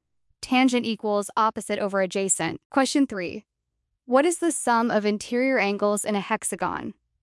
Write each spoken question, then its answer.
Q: What is the sum of interior angles in a hexagon?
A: A hexagon has 6 sides, so we calculate 180 times 6 minus 2, which gives 180 times 4 equals 720 degrees.